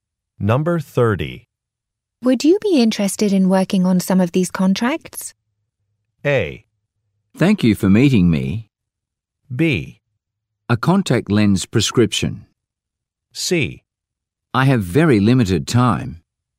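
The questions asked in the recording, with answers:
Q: Would you be interested in working on some of these contracts?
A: C: I have very limited time.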